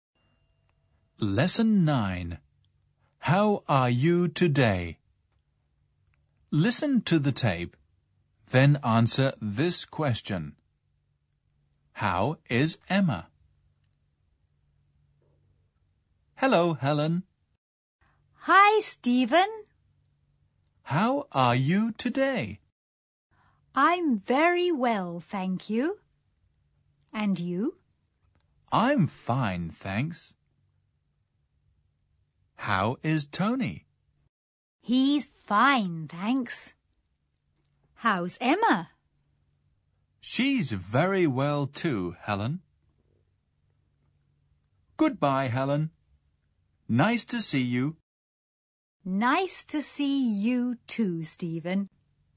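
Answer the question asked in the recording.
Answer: She's very well.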